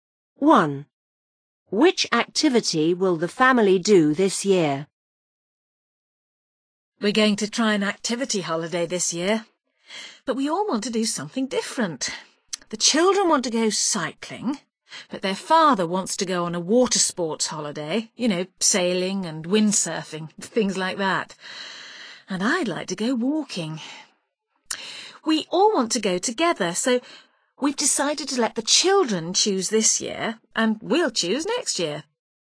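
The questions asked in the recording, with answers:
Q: Which activity will the family do this year?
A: cycling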